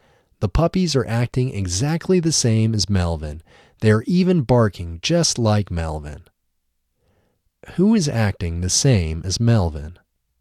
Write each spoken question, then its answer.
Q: Who is acting the same as Melvin?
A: The puppies are acting the same as Melvin.